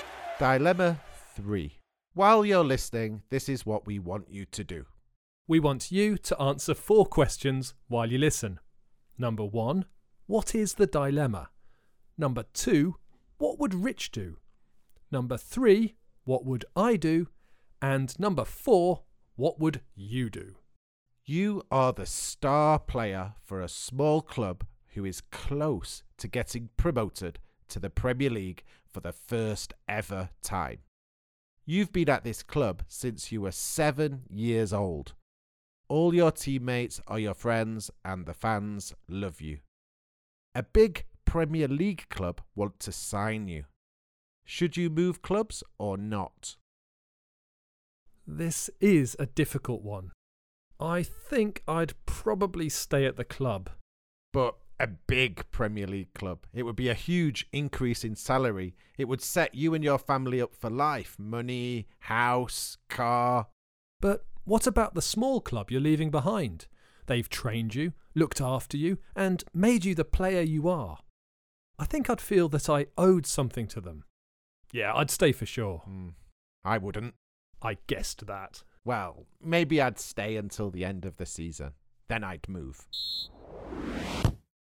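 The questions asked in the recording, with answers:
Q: what is the dilemma?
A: Whether to stay at his small club or move to a big Premier League club

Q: what would Rich do?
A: Move, maybe after staying until the end of the season

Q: what would I do?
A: Stay at the club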